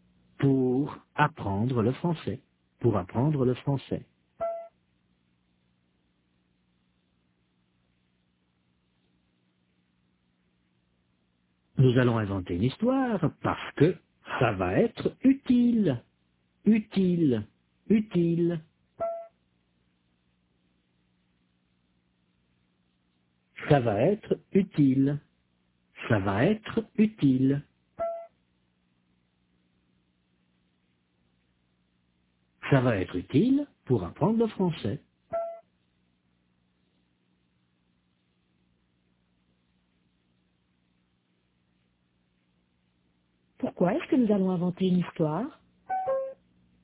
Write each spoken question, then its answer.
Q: Pourquoi est-ce que nous allons inventer une histoire?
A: Parce que ça va être utile pour apprendre le français.